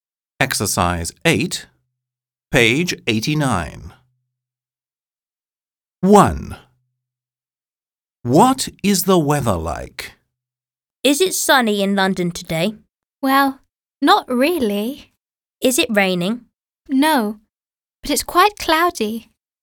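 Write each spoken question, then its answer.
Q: What is the weather like?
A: Cloudy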